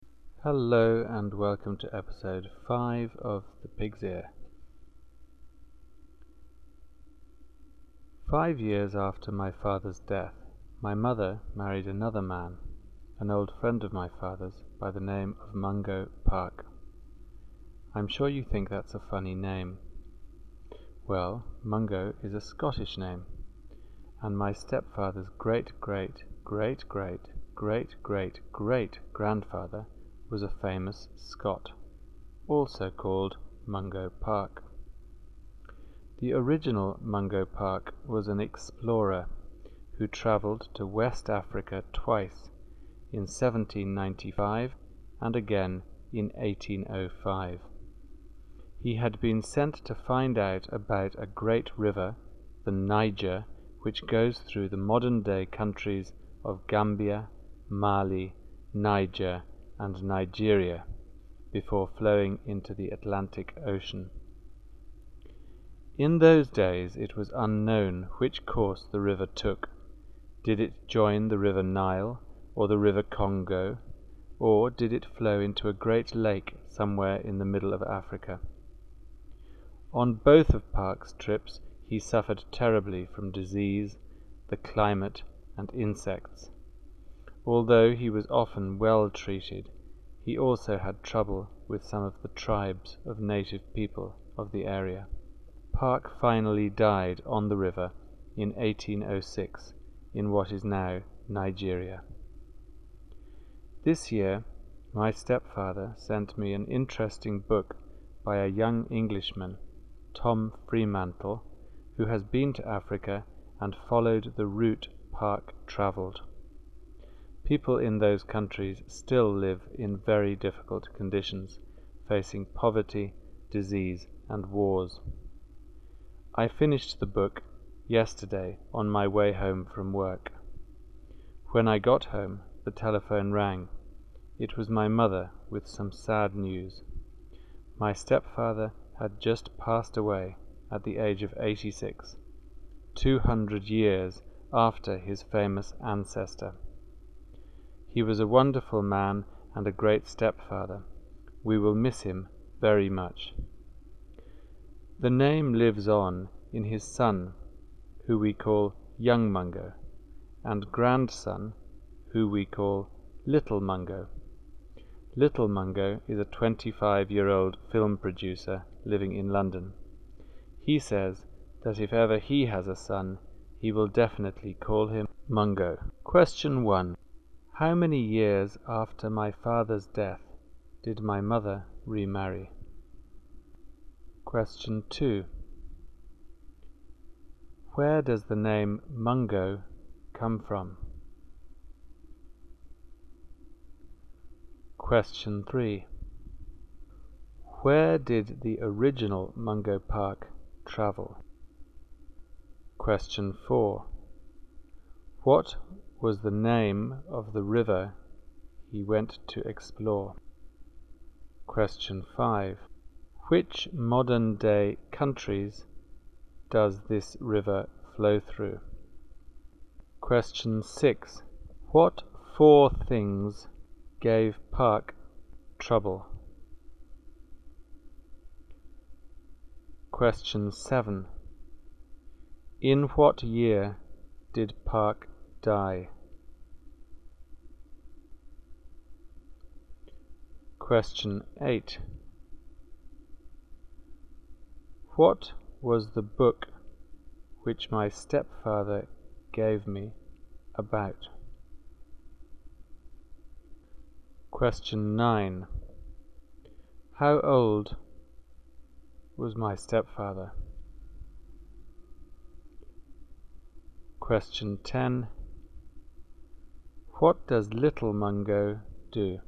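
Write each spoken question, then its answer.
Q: How many years after my father's death did my mother remarry?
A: 5 years

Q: Where does the name Mungo come from?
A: Scotland (it is a Scottish name)

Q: Where did the original Mungo Park travel?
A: West Africa

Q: What was the name of the river he went to explore?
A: The Niger

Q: Which modern-day countries does this river flow through?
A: Gambia, Mali, Niger and Nigeria

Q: What 4 things gave Park trouble?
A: Disease, the climate, insects and some native tribes

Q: In what year did Park die?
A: 1806

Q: What was the book which my stepfather gave me about?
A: A young Englishman, Tom Freemantle, following Park's route through Africa

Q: How old was my stepfather?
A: 86

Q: What does Little Mungo do?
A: He is a film producer in London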